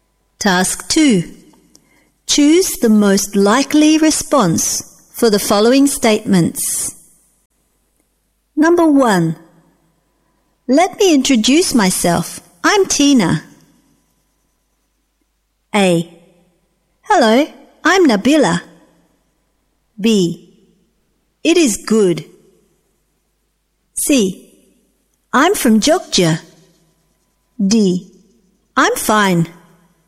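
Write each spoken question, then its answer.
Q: Let me introduce myself.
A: A: Hello, I'm Nabila.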